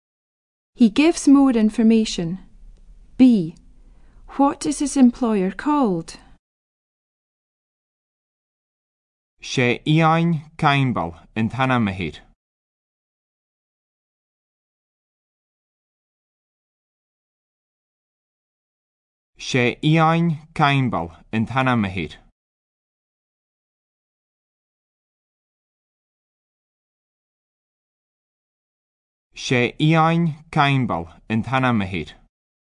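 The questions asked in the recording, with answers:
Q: What is his employer called?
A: Iain Campbell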